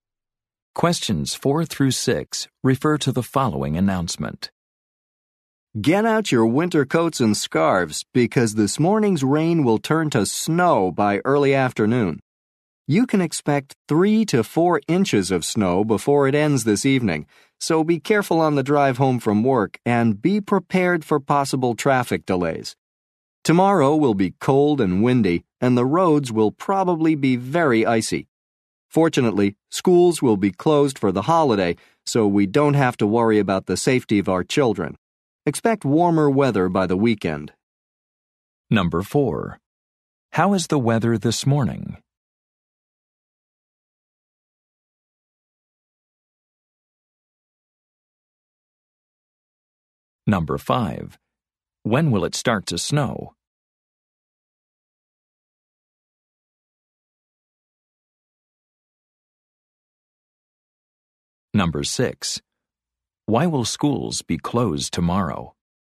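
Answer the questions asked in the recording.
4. Rainy
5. By early afternoon
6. For the holiday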